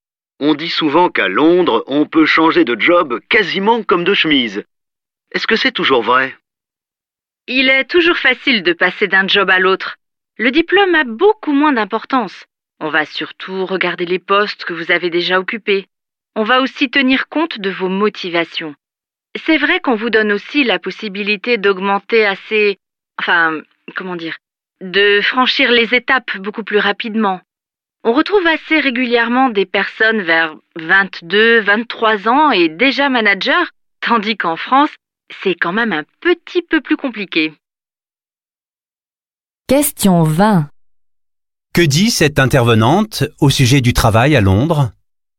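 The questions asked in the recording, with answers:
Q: Que dit cette intervenante au sujet du travail à Londres ?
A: Il est facile de changer d'emploi, le diplôme compte moins que l'expérience, et on peut évoluer très vite.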